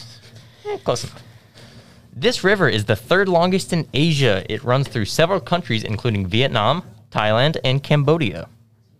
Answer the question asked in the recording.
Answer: The Mekong River.